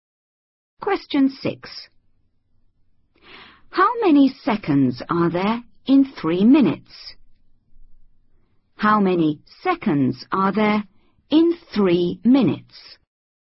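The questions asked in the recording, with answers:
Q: How many seconds are there in 3 minutes?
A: 180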